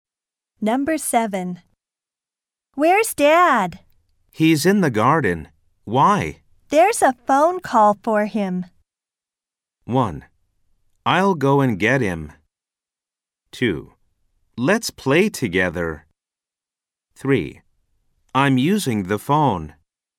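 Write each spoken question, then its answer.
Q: There's a phone call for him.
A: 1: I'll go and get him.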